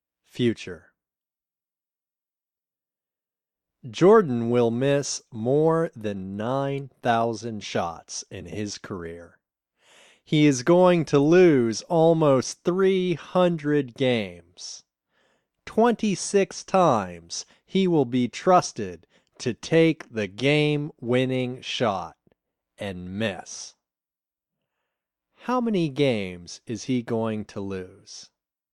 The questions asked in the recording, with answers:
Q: How many games is he going to lose?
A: He is going to lose almost 300 games.